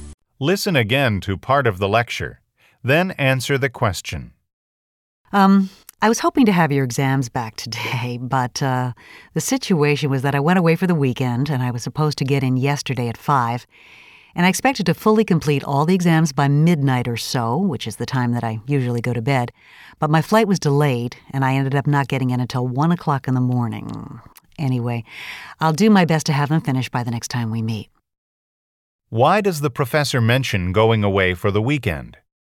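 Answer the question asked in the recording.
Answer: To explain why the exams are not graded and returned yet (his delayed flight left no time)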